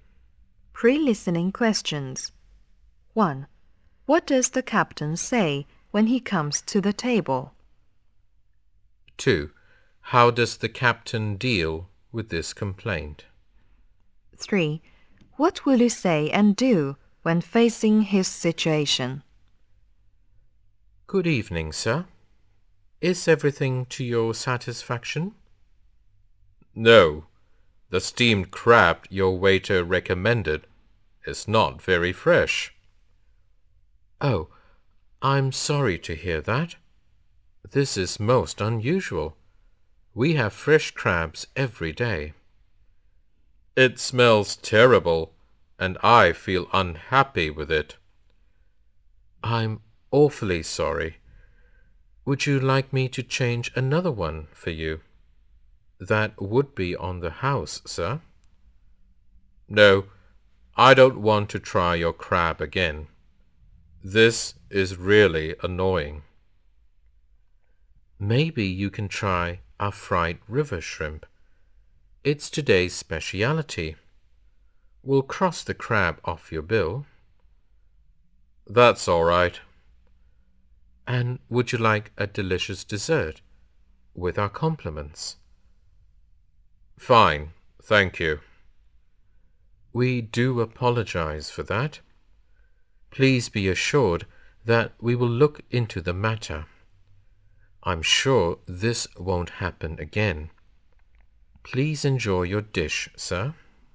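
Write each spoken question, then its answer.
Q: What does the captain say when he comes to the table?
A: Good evening, sir. Is everything to your satisfaction?

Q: How does the captain deal with this complaint?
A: He apologizes, offers a free replacement, suggests fried river shrimp, takes the crab off the bill and offers a free dessert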